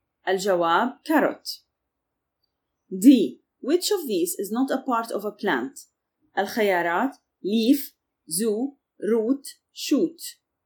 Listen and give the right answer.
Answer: الجواب zoo.